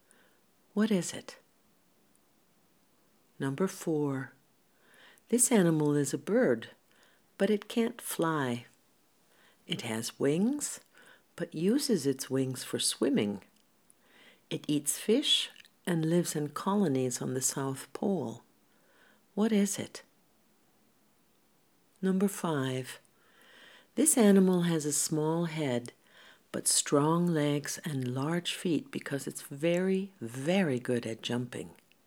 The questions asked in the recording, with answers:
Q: What is it?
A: It's a penguin.